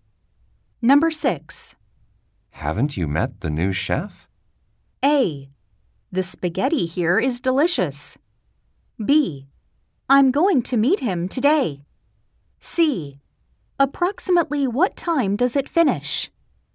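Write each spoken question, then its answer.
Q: Haven't you met the new chef?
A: B: I'm going to meet him today.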